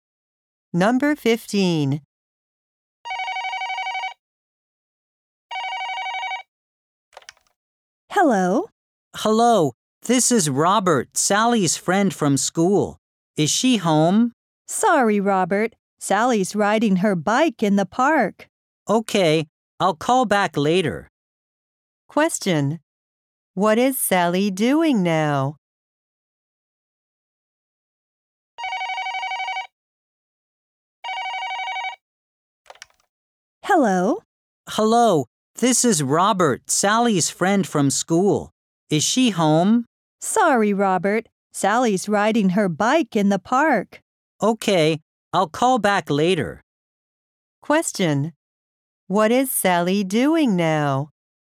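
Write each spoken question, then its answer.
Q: What is Sally doing now?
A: Riding her bike in the park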